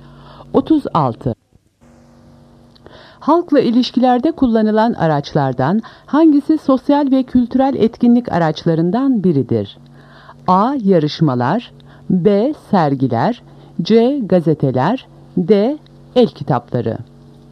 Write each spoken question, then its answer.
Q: Halkla ilişkilerde kullanılan araçlardan hangisi sosyal ve kültürel etkinlik araçlarından biridir?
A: Doğru cevap A. Yarışmalar.